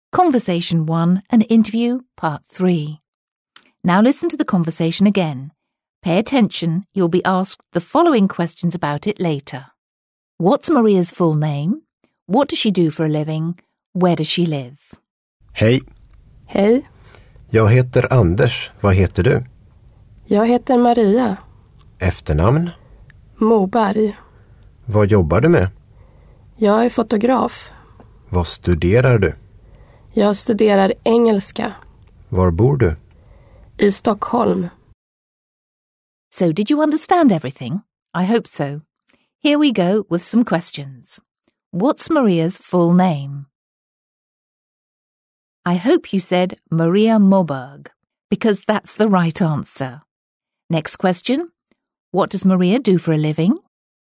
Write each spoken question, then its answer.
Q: What does Maria do for a living?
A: Did you say she's a photographer?